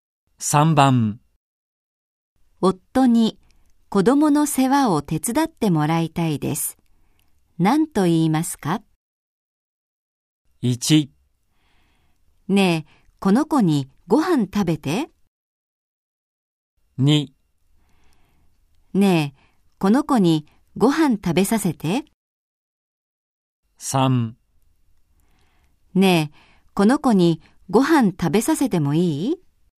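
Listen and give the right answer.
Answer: 2: ねえ、この子にご飯食べさせて。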